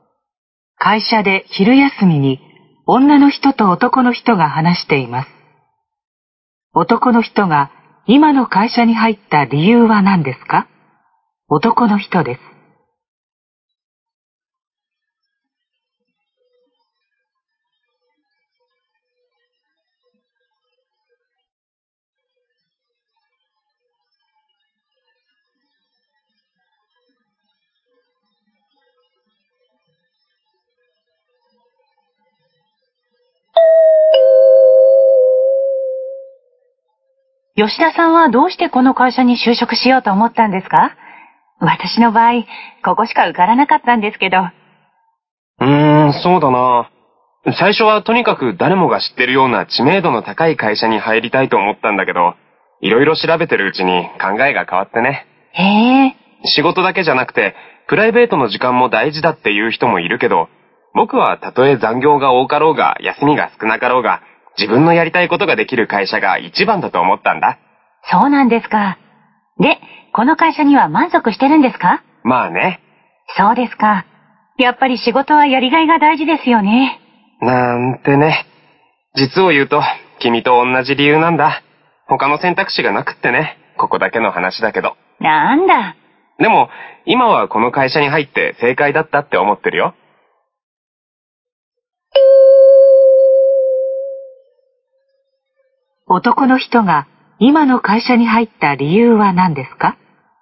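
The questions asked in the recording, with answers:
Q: 男の人が今の会社に入った理由は何ですか?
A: ほかに受かった会社がなかったから(この会社しか選択肢がなかったから)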